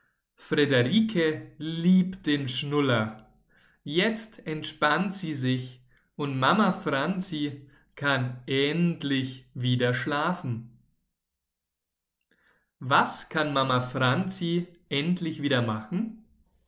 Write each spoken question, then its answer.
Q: Was kann Mama Franzi endlich wieder machen?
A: sie kann endlich wieder schlafen.